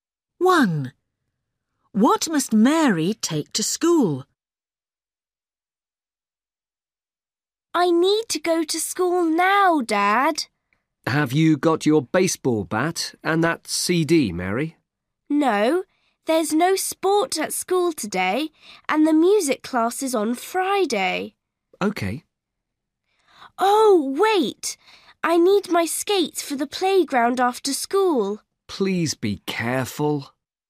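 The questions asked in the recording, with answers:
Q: What must Mary take to school?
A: Her skates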